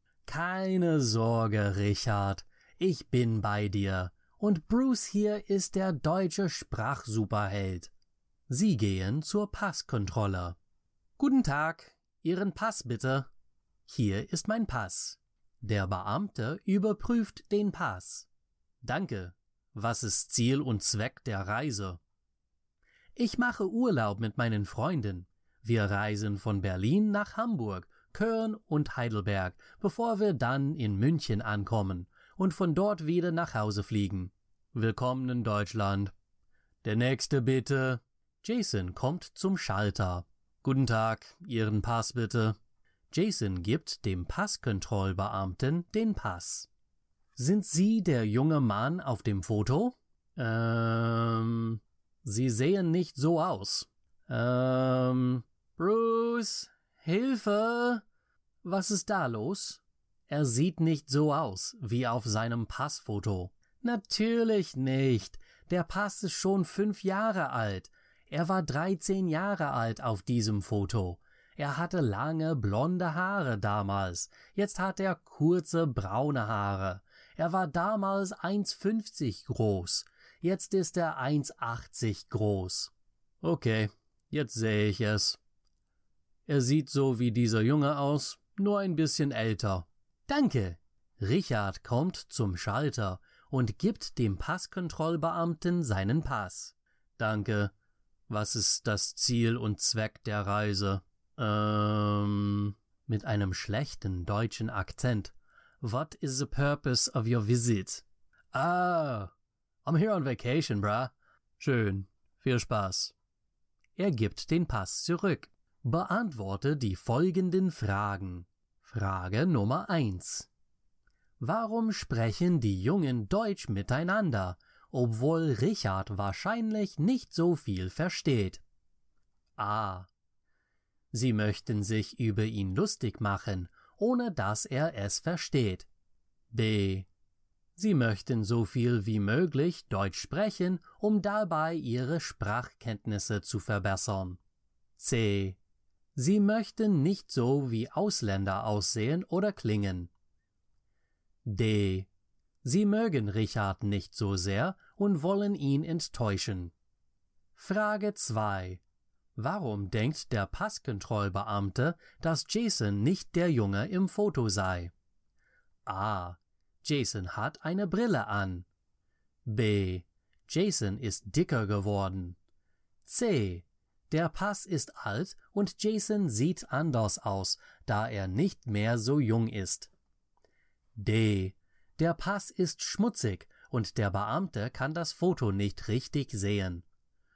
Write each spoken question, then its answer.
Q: Warum denkt der Passkontrollbeamte, dass Jason nicht der Junge im Foto sei?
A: Die richtige Antwort ist C.